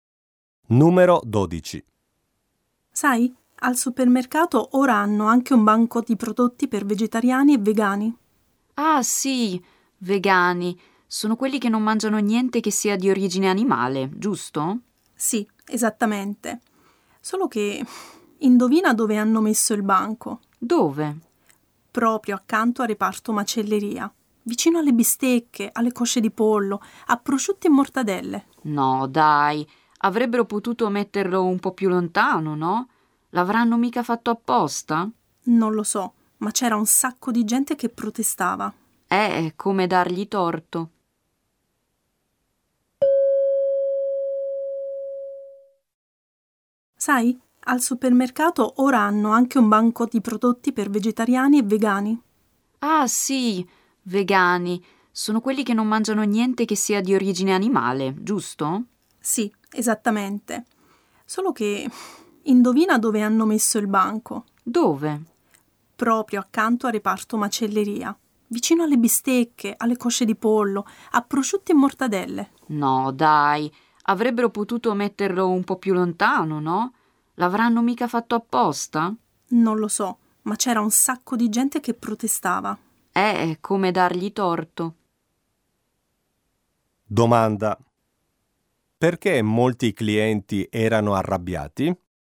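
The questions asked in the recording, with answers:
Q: Perché molti clienti erano arrabbiati?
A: Perché il banco vegetariano e vegano è stato messo accanto alla macelleria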